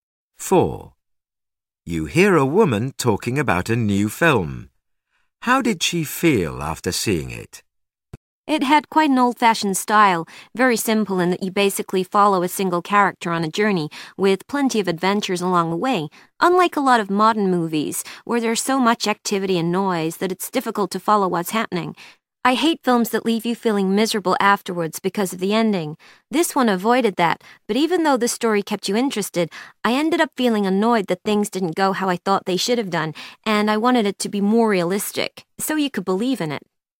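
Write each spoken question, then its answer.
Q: How did she feel after seeing it?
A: Annoyed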